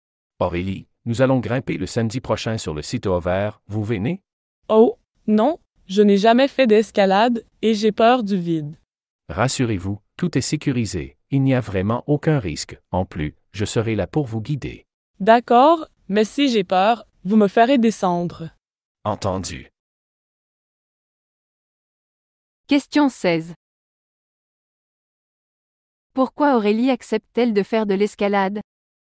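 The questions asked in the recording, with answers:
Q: Pourquoi Aurélie accepte-t-elle de faire de l'escalade?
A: Parce que tout est sécurisé, sans risque, et qu'il sera là pour la guider.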